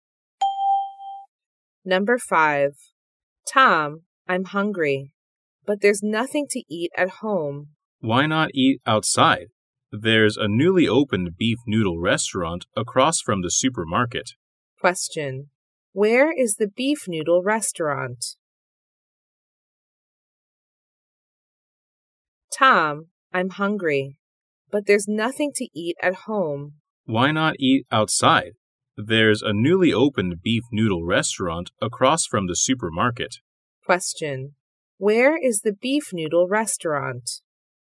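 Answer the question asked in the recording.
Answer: Across from the supermarket.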